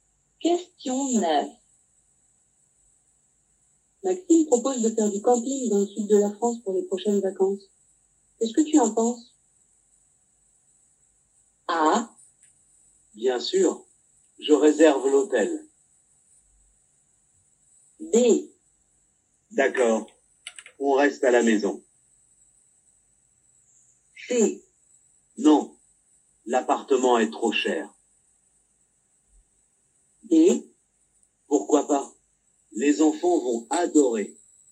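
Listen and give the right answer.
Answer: D: Pourquoi pas? Les enfants vont adorer.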